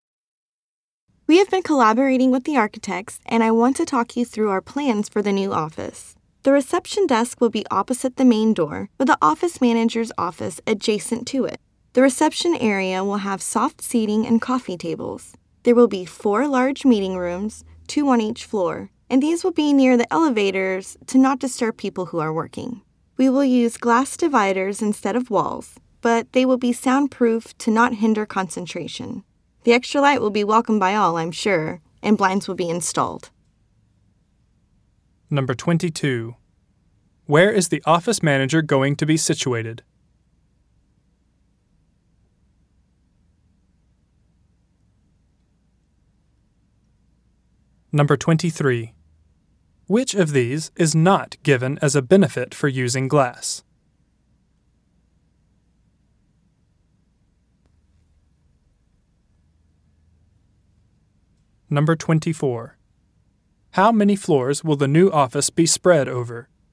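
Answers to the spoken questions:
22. Next to the reception desk, opposite the main door
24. Two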